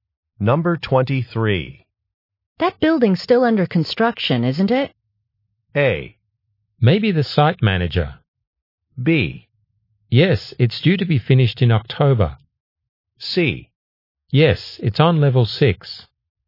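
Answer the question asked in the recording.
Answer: B: Yes, it's due to be finished in October.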